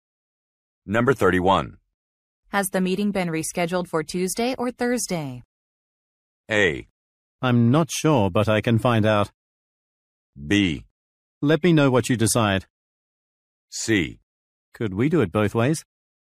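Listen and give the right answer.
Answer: A: I'm not sure, but I can find out.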